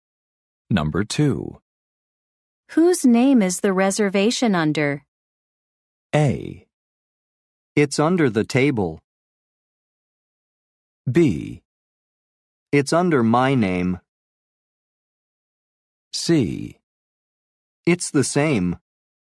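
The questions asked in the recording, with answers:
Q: Whose name is the reservation under?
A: B: It's under my name.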